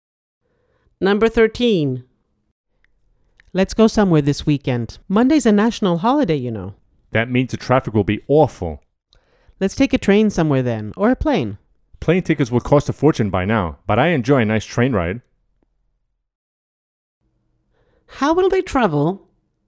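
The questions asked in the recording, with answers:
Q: How will they travel?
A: By train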